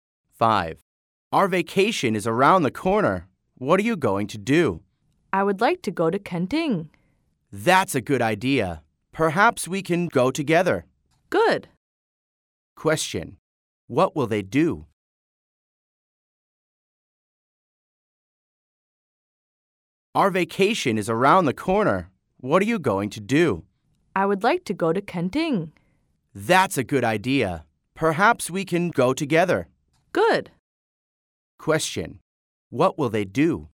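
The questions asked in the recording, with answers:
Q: What will they do?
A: Go to Kenting together on vacation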